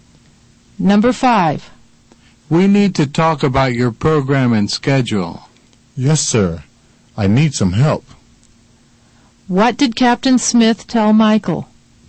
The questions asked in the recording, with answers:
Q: What did Captain Smith tell Michael?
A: He told Michael they needed to talk about his program and schedule.